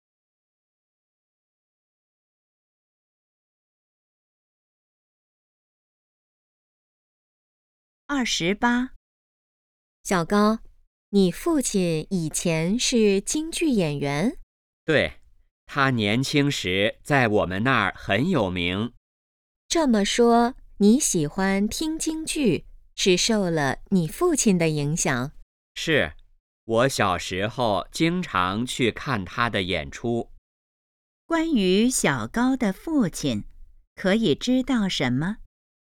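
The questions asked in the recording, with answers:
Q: 关于小高的父亲,可以知道什么?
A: 以前是京剧演员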